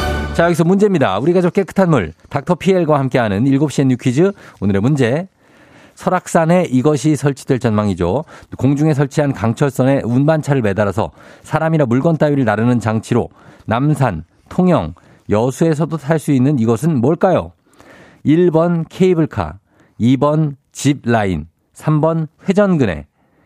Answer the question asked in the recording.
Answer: 정답 1번 케이블카죠.